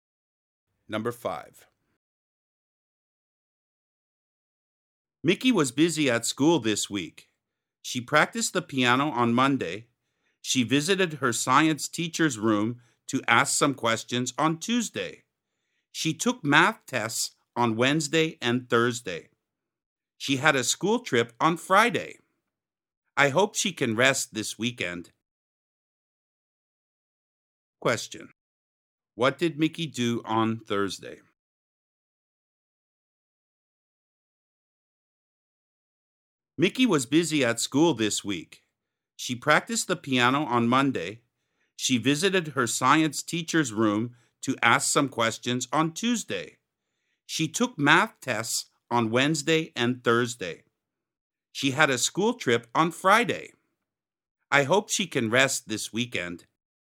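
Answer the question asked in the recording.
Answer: She took a math test.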